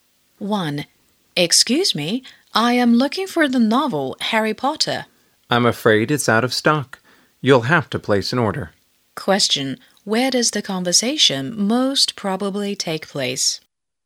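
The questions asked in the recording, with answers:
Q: Where does the conversation most probably take place?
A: In a bookstore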